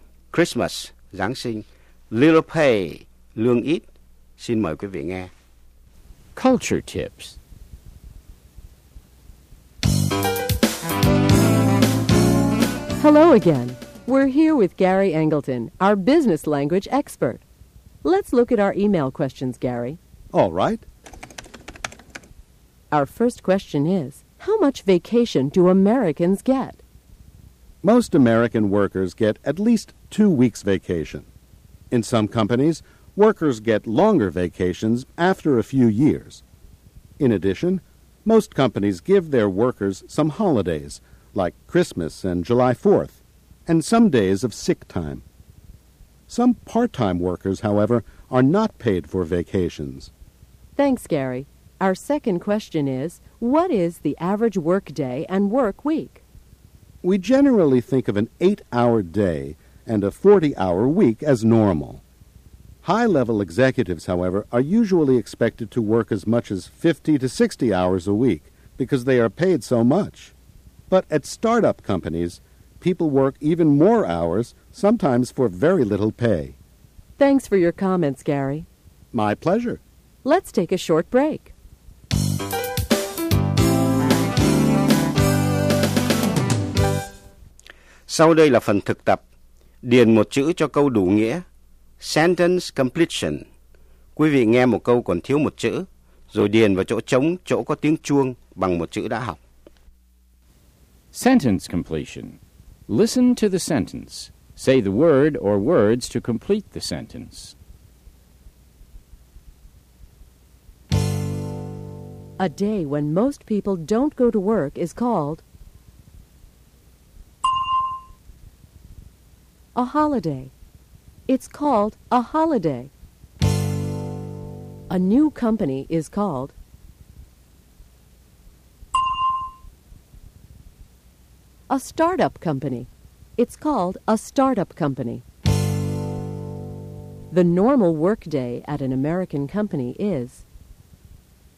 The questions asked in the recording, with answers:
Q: A day when most people don't go to work is called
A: a holiday. It's called a holiday.

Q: The normal work day at an American company is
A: 8 hours. The normal work day is 8 hours.